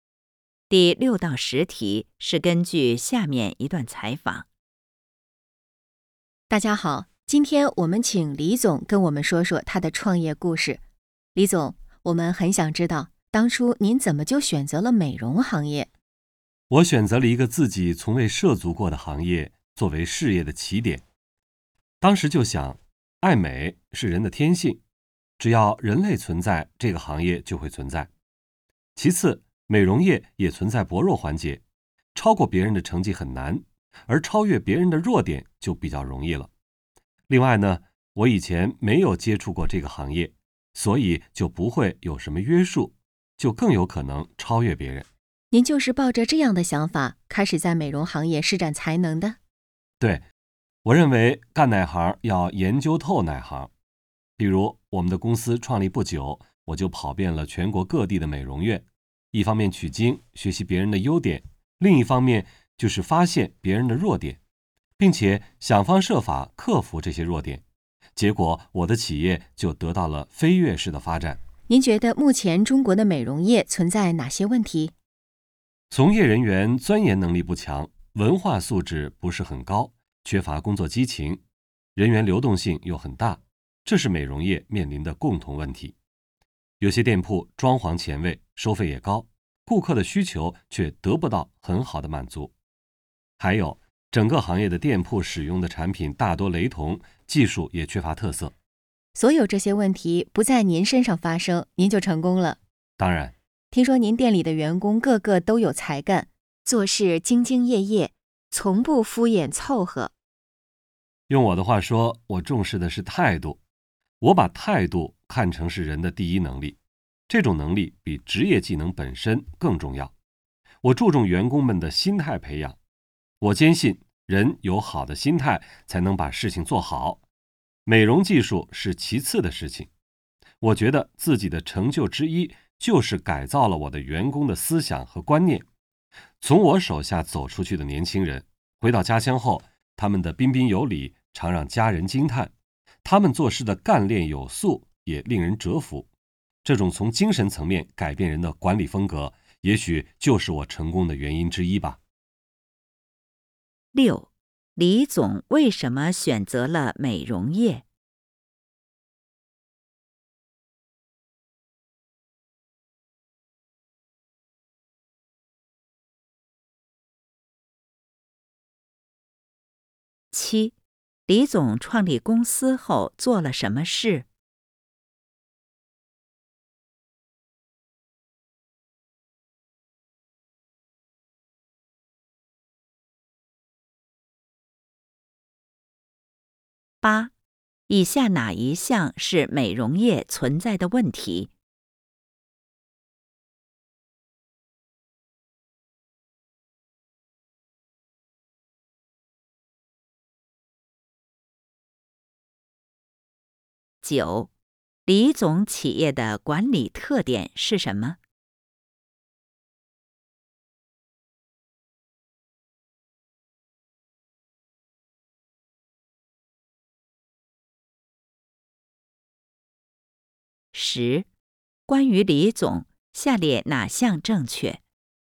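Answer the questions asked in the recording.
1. 爱美是人的天性,这个行业会一直存在;美容业有薄弱环节,容易超越别人
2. 跑遍全国各地的美容院,学习别人的优点,发现别人的弱点
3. 从业人员素质不高、流动性大;产品雷同,技术缺乏特色
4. 重视员工的态度和心态培养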